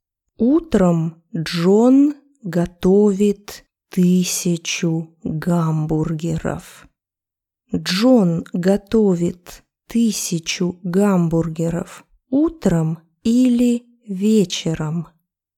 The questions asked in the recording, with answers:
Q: Джон готовит 1000 гамбургеров утром или вечером?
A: Утром. Он готовит гамбургеры утром.